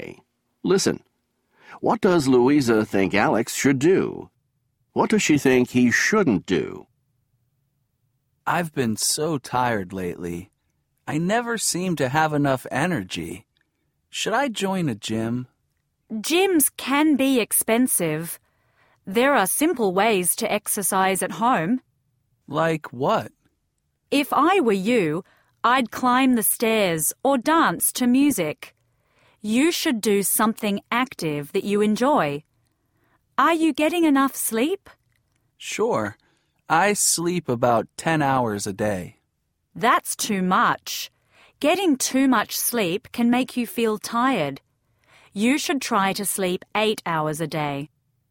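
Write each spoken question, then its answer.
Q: What does Louisa think Alex should do?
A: Exercise at home, like climbing stairs or dancing to music, and sleep 8 hours a day

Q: What does she think he shouldn't do?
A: Join a gym or sleep too much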